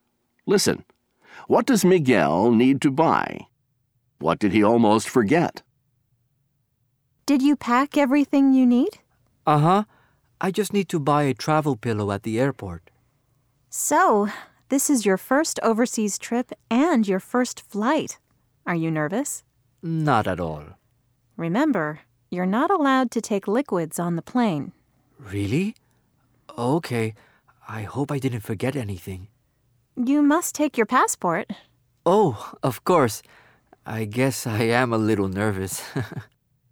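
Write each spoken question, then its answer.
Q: What does Miguel need to buy?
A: A travel pillow

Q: What did he almost forget?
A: His passport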